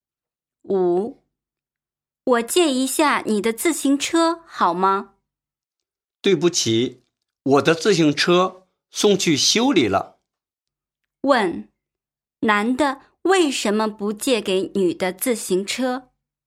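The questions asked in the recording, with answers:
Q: 问,男的为什么不借给女的自行车?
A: 他的自行车送去修理了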